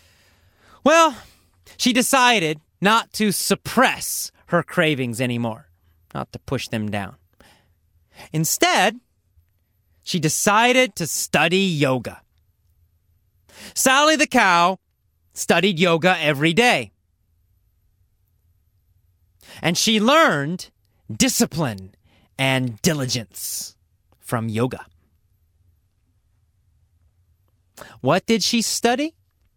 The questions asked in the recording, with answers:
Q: What did she study?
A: She learned yoga.